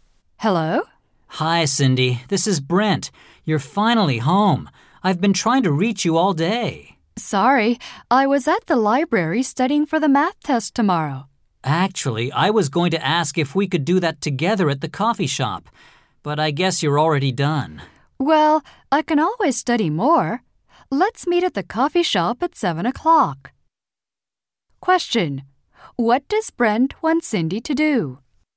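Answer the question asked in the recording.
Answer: Study for the math test with him at the coffee shop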